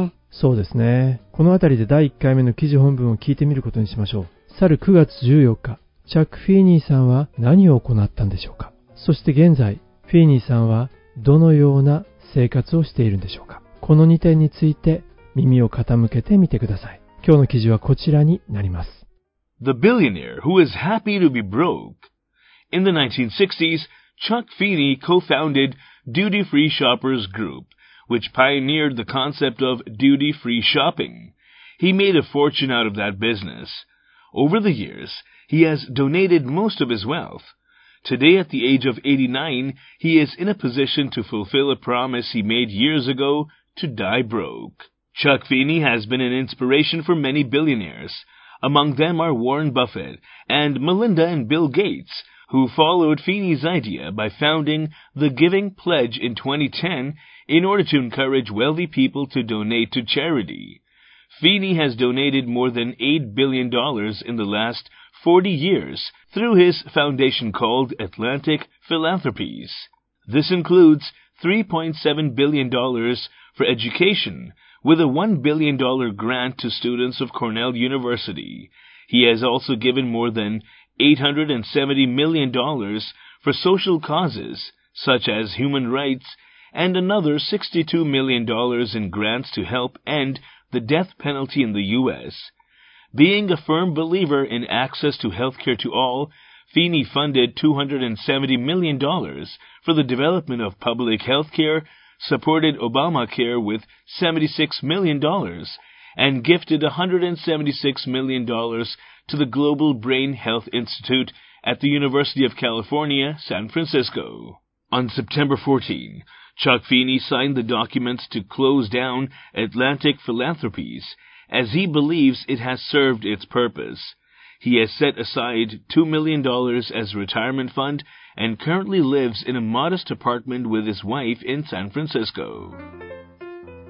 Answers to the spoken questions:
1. 彼自身の財団、アトランティック・フィランソピーを close down、閉鎖する、その文章に署名をしたんです。
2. サンフランシスコの modest apartment、まあ、質素なアパート、こちらに奥さんと一緒に、住んでいるんですね。